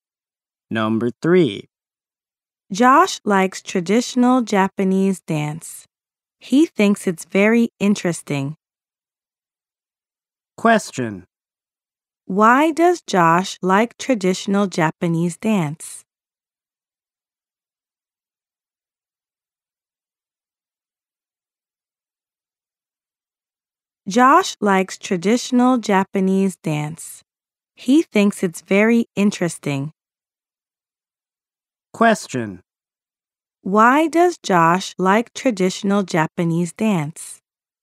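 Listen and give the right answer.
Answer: Because he thinks it's very interesting.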